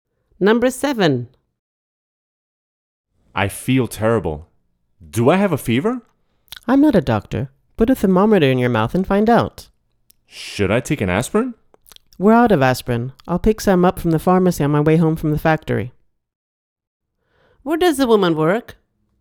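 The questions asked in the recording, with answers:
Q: Where does the woman work?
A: In a factory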